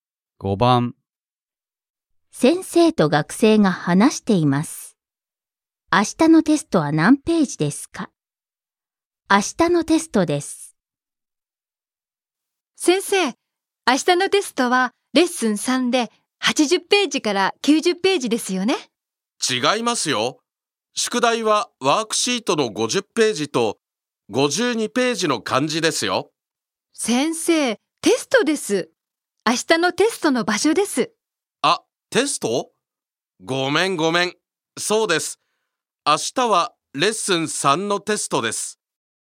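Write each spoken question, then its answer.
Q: 明日のテストは何ページですか?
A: 80ページから90ページ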